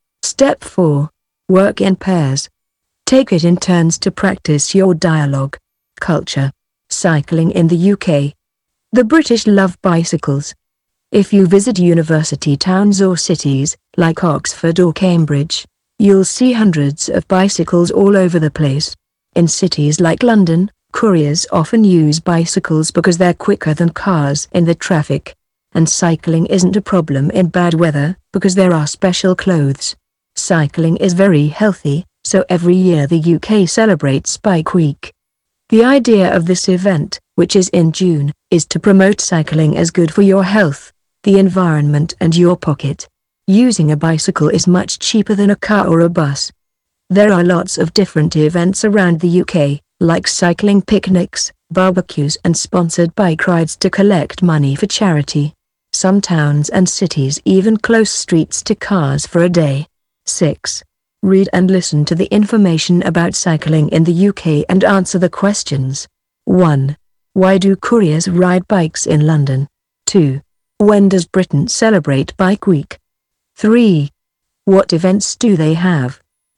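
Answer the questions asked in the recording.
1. Because they're quicker than cars in the traffic
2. In June
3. Cycling picnics, barbecues and sponsored bike rides to collect money for charity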